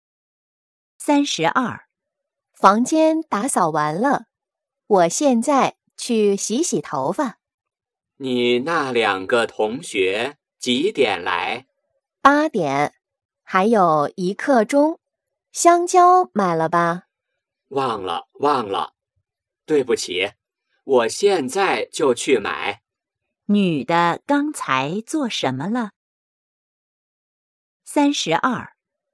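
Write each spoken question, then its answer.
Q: 女的刚才做什么了?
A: 打扫房间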